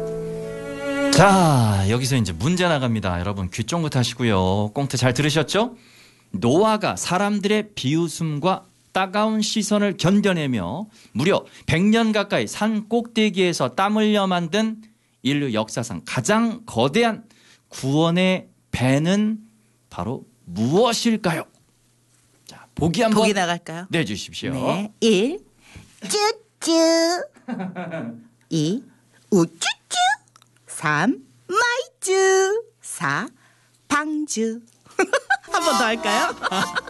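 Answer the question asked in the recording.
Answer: 4: 방주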